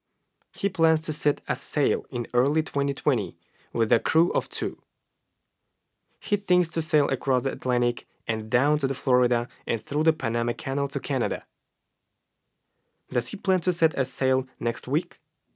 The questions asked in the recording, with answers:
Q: Does he plan to set a sail next week?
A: No, he doesn't plan to set a sail next week.